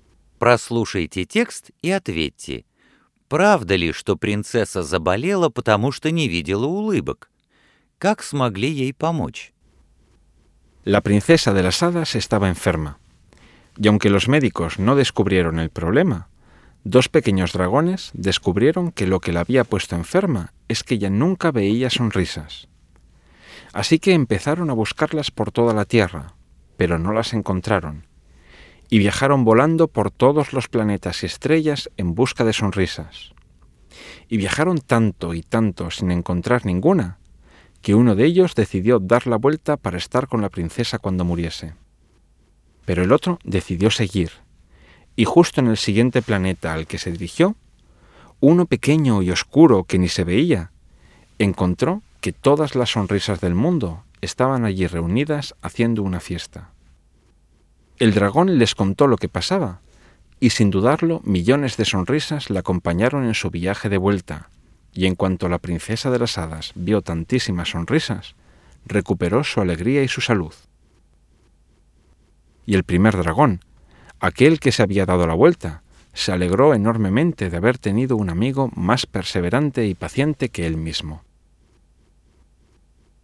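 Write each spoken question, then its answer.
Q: Правда ли, что принцесса заболела, потому что не видела улыбок?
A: Да, правда

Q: Как смогли ей помочь?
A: Дракон нашёл улыбки на маленькой тёмной планете и привёз миллионы улыбок к принцессе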